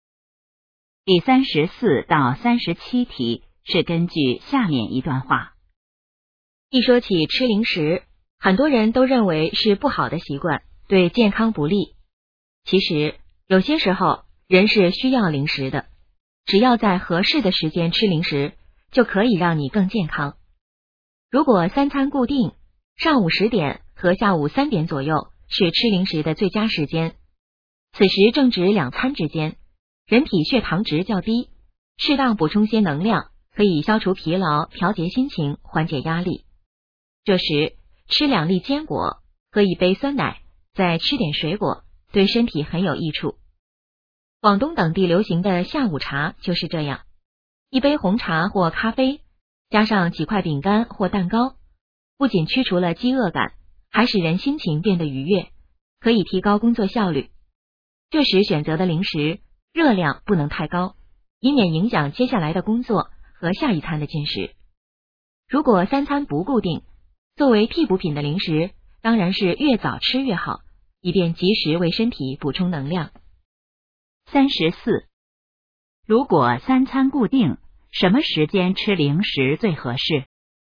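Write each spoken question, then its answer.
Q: 如果三餐固定,什么时间吃零食最合适?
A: 上午10点和下午3点左右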